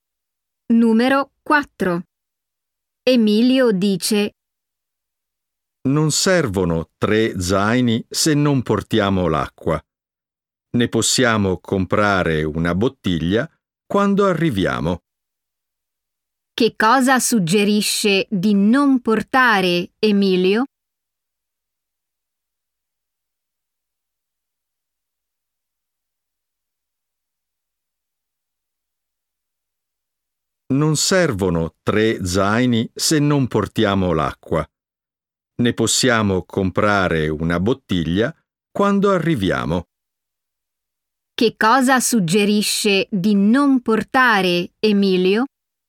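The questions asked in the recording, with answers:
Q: Che cosa suggerisce di non portare, Emilio?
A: L'acqua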